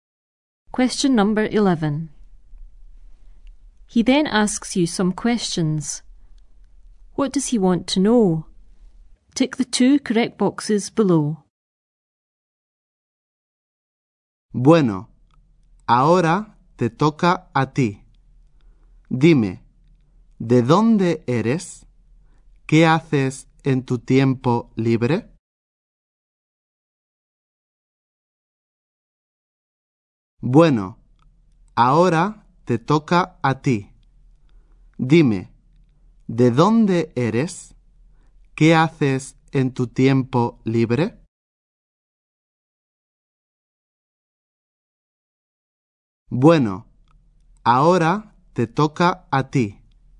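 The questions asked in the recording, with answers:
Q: What does he want to know?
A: Where you are from and what you do in your free time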